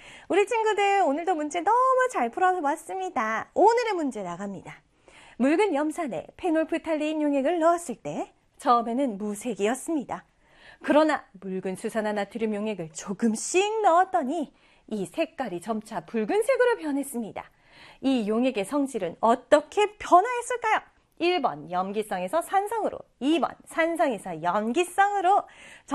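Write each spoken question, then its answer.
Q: 이 용액의 성질은 어떻게 변화했을까요? 1번 염기성에서 산성으로, 2번 산성에서 염기성으로.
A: 2번: 산성에서 염기성으로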